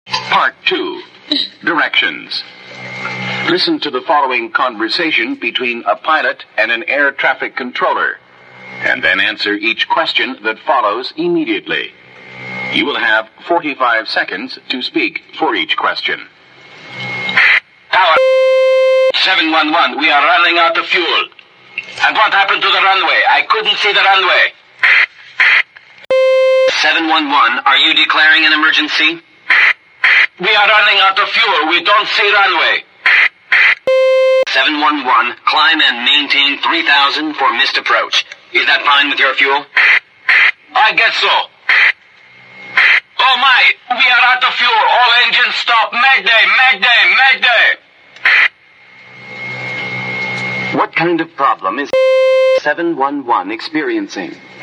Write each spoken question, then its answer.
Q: What kind of problem is 711 experiencing?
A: 711, we're running out of the fuel and they can't see the runway.